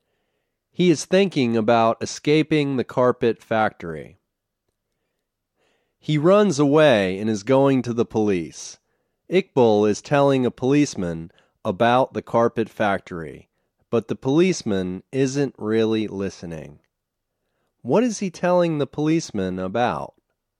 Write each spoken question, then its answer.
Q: What is he telling the policeman about?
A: He is telling the policeman about the carpet factory.